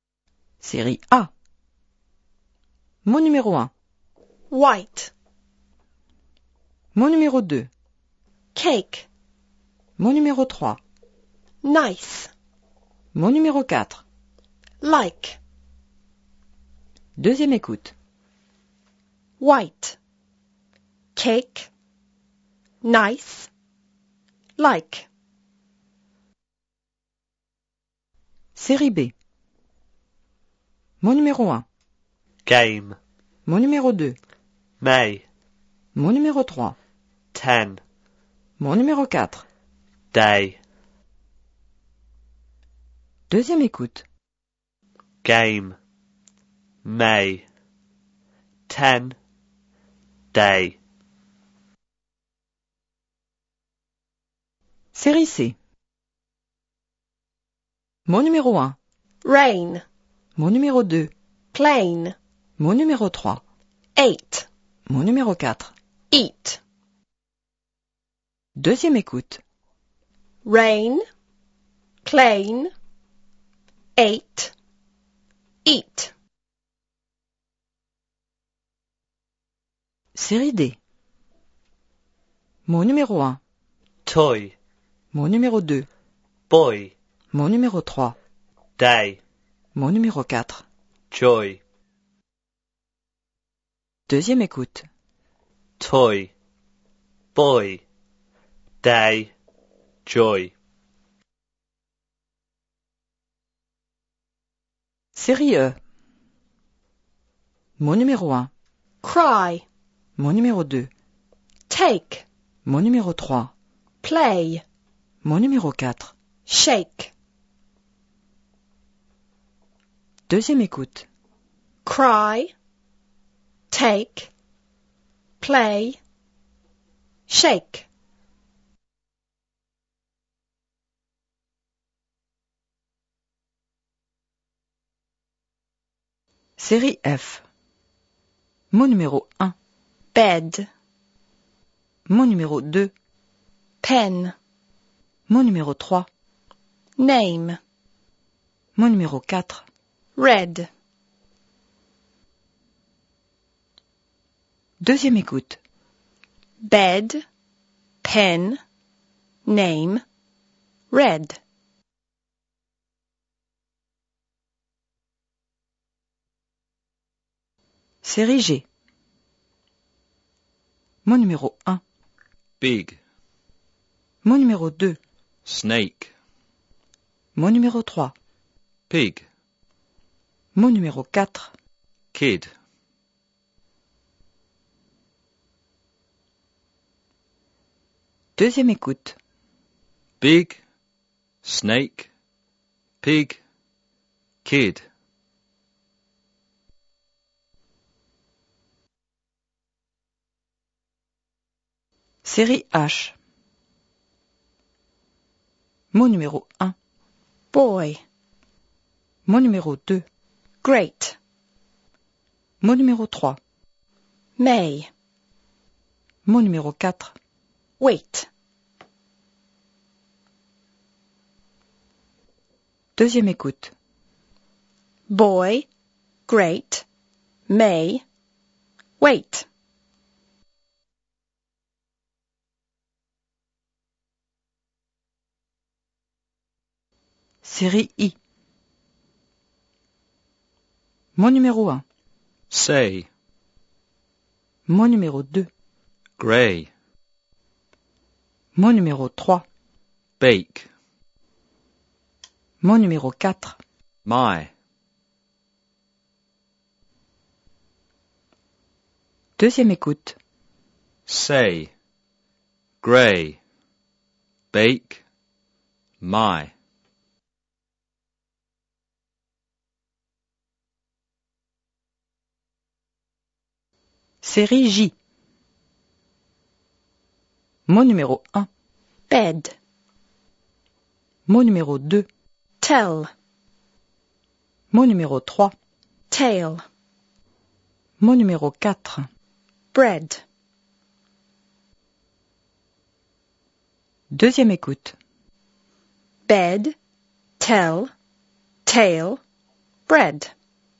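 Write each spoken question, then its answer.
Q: White. Cake. Nice. Like.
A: 2: Cake

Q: Game. May. Ten. Day.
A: 3: Ten

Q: Rain. Plane. Eight. Eat.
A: 4: Eat

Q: Toy. Boy. Day. Joy.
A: 3: Day

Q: Cry. Take. Play. Shake.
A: 1: Cry

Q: Bed. Pen. Name. Red.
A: 3: Name

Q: Big. Snake. Pig. Kid.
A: 2: Snake

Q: Boy. Great. May. Wait.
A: 1: Boy

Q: Say, grey, bake, my.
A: 4: My

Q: Bed, tell, tail, bread.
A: 3: Tail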